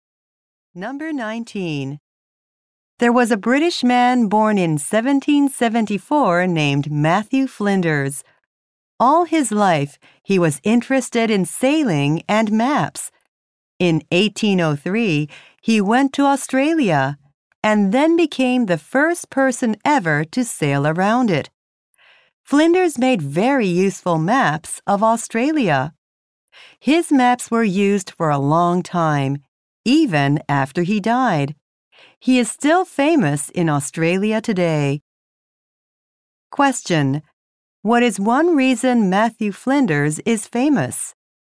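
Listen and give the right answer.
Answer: He was the first to sail around Australia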